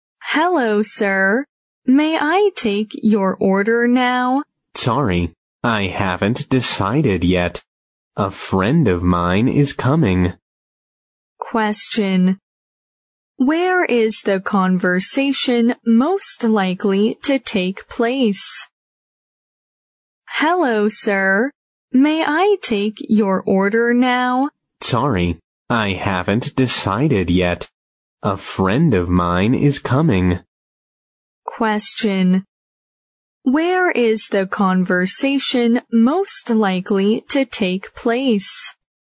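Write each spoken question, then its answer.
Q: Where is the conversation most likely to take place?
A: In a restaurant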